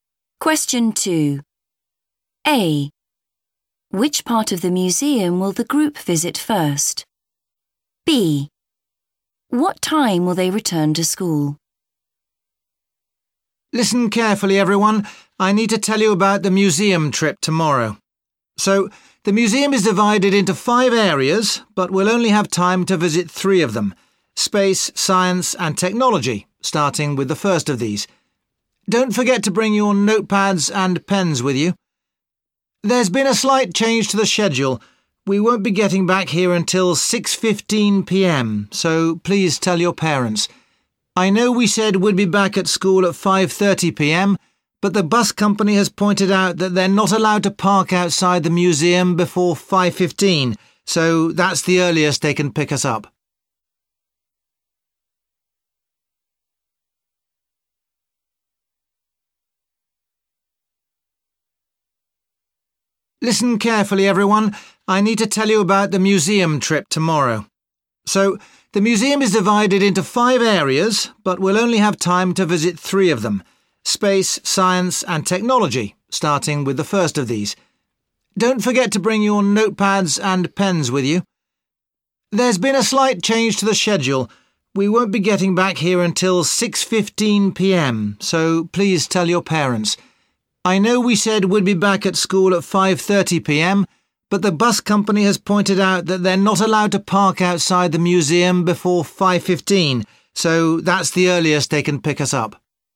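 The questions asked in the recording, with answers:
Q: Which part of the museum will the group visit first?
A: Space

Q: What time will they return to school?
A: 6:15 p.m.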